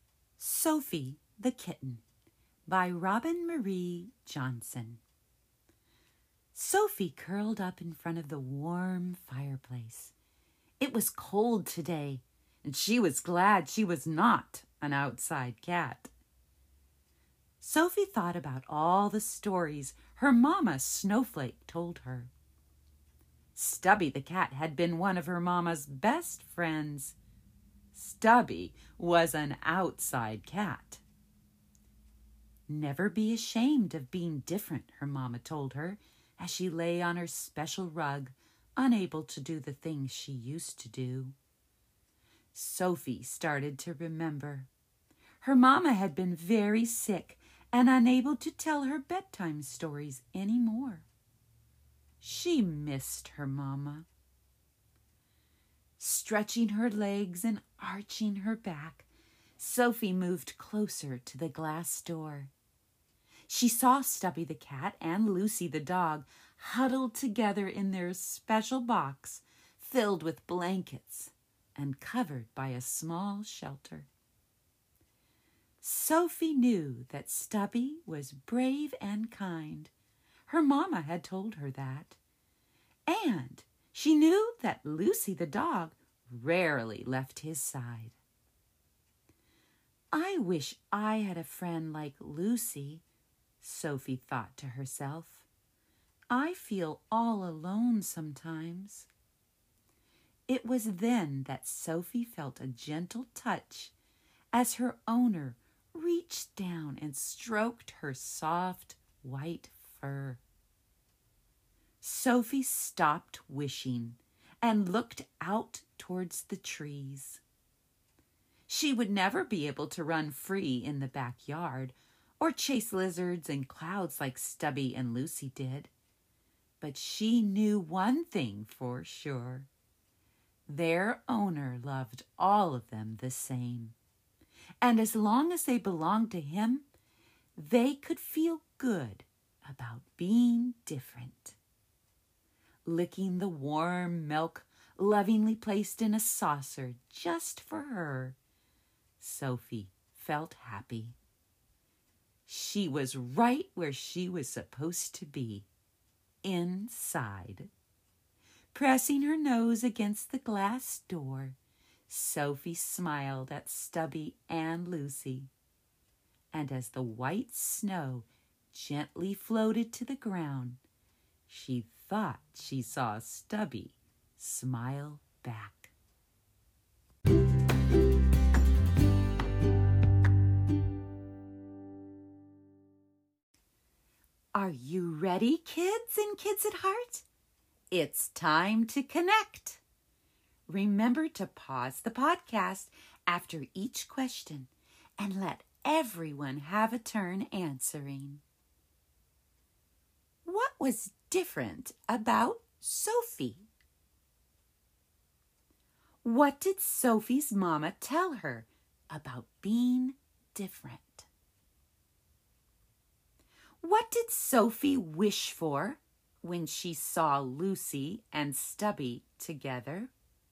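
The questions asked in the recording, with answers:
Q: What did Sophie's mama tell her about being different?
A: Never be ashamed of being different

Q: What did Sophie wish for when she saw Lucy and Stubby together?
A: A friend like Lucy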